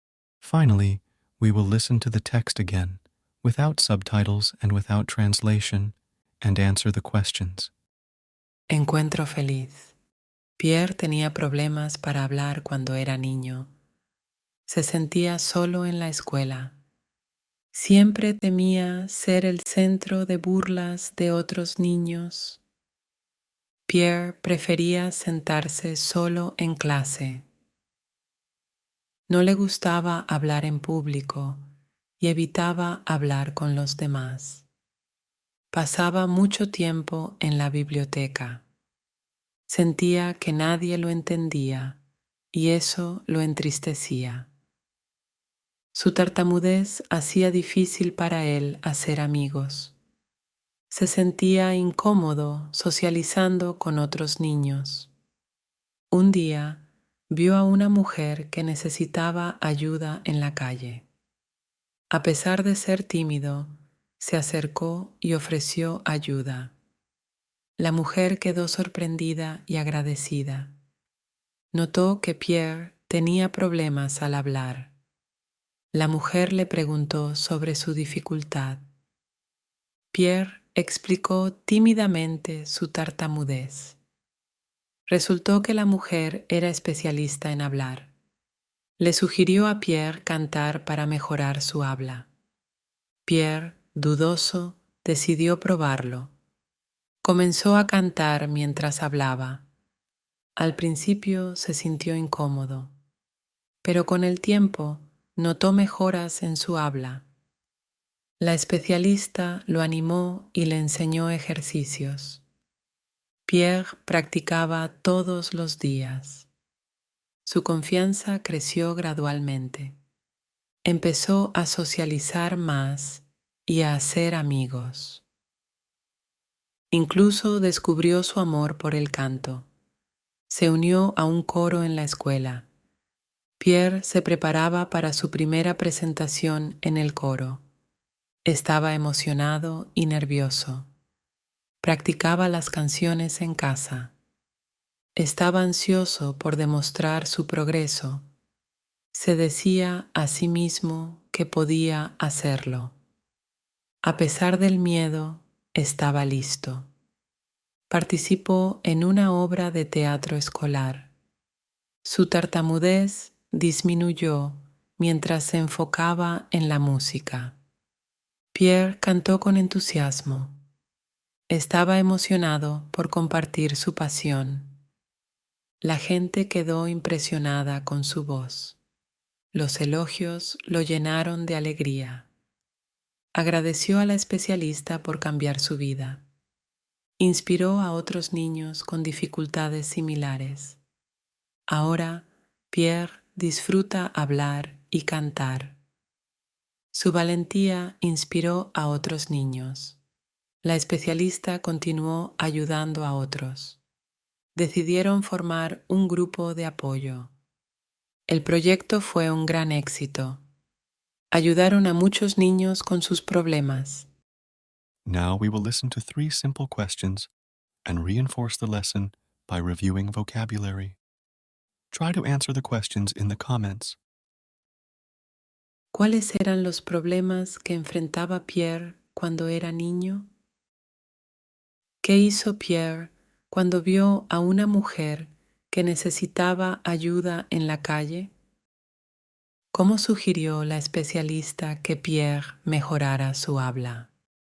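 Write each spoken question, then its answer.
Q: ¿Cuáles eran los problemas que enfrentaba Pierre cuando era niño?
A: Tenía tartamudez y problemas para hablar; se sentía solo y temía las burlas

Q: ¿Qué hizo Pierre cuando vio a una mujer que necesitaba ayuda en la calle?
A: A pesar de ser tímido, se acercó y le ofreció ayuda

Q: ¿Cómo sugirió la especialista que Pierre mejorara su habla?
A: Cantando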